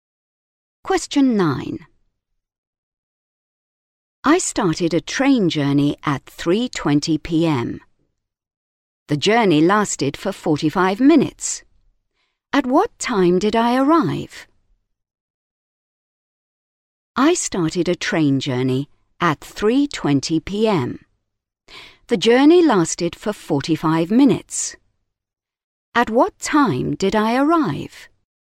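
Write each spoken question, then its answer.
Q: At what time did I arrive?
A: 4:05 p.m.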